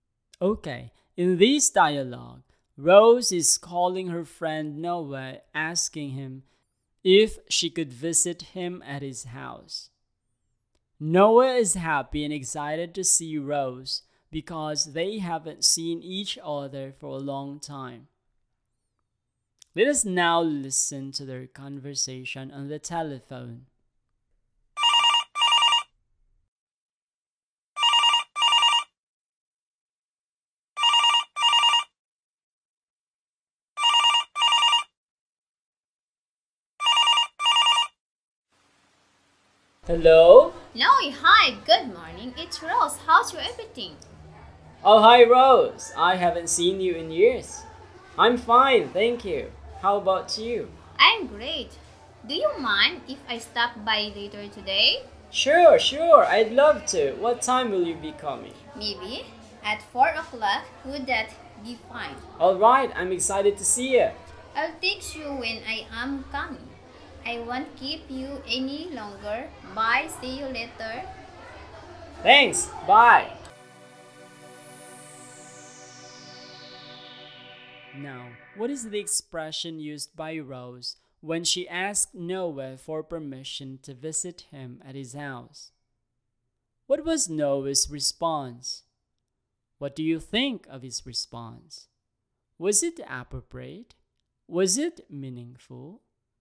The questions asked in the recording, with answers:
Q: Now, what is the expression used by Rose when she asked Noah for permission to visit him at his house?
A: So the expression that you can use to say in English when you want to visit someone is, "Do you mind if?"